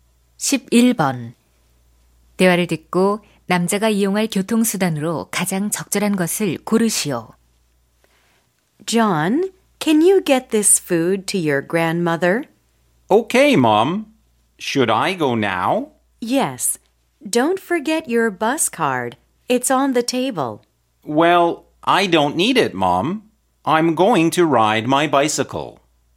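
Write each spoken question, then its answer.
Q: 대화를 듣고 남자가 이용할 교통수단으로 가장 적절한 것을 고르시오.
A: 자전거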